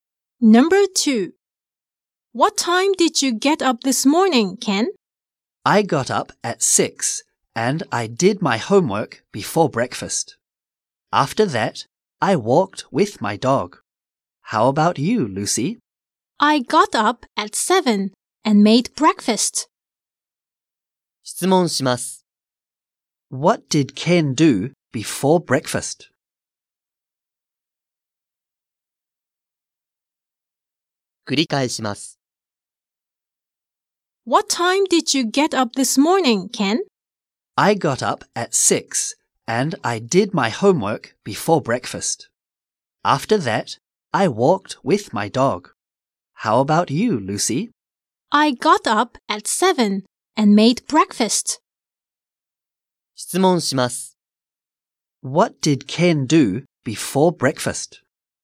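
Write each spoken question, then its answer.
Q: What did Ken do before breakfast?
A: He did his homework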